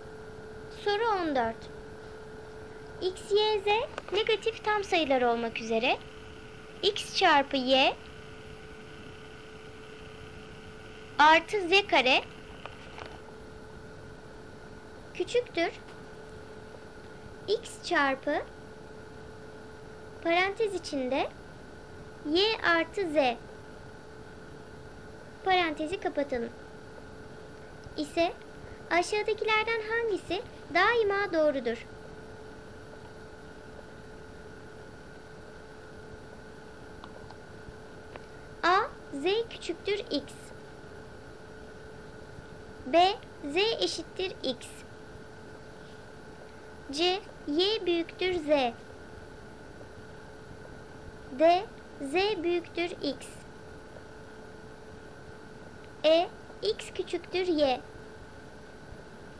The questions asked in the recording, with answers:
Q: küçüktür x çarpı parantez içinde y artı z parantezi kapatalım ise aşağıdakilerden hangisi daima doğrudur?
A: Doğru cevap D z büyüktür x.